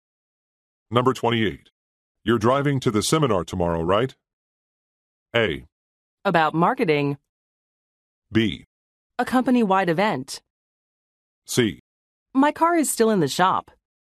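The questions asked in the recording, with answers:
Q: You're driving to the seminar tomorrow, right?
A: C: My car is still in the shop.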